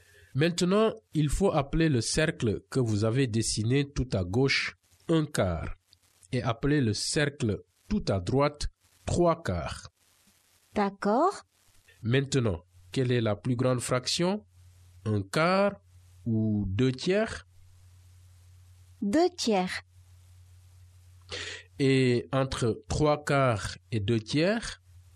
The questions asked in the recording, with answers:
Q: Maintenant, quelle est la plus grande fraction? Un quart ou deux tiers?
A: Deux tiers.

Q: Et entre trois quarts et deux tiers?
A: Trois quarts.